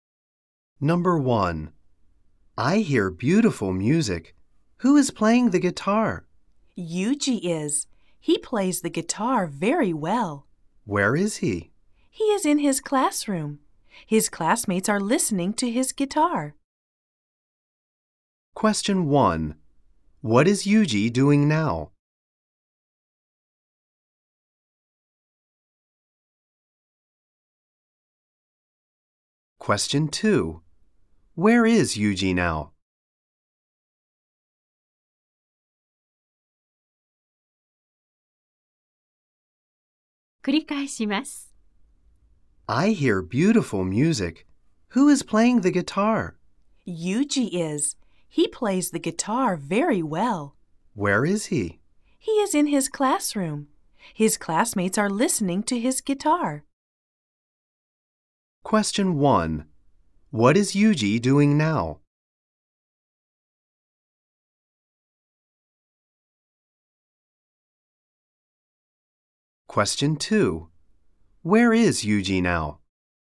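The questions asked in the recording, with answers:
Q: What is Yuji doing now?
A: ギターを弾いている

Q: Where is Yuji now?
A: 教室にいる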